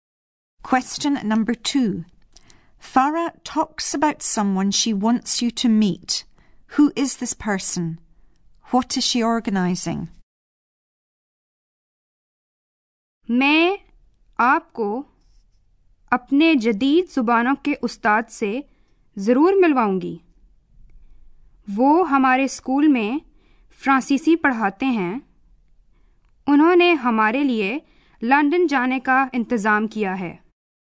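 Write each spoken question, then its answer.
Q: Who is this person? What is she organising?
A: Her modern languages teacher, who teaches French; organising a trip to London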